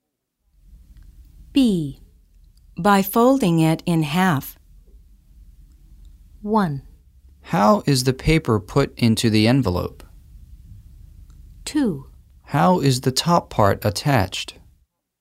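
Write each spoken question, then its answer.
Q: By folding it in half.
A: 1: How is the paper put into the envelope?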